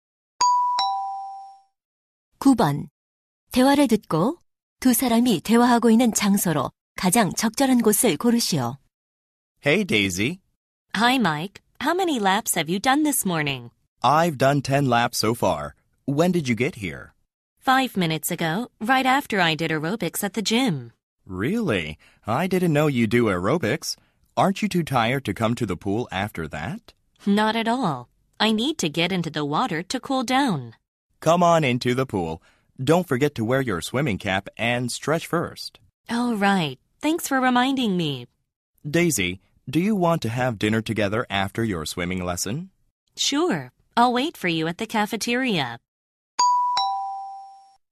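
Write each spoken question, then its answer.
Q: 대화를 듣고 두 사람이 대화하고 있는 장소로 가장 적절한 곳을 고르시오.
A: 수영장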